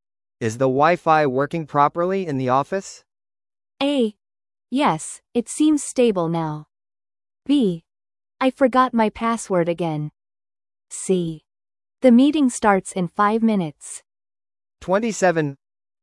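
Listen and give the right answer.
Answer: A: Yes, it seems stable now.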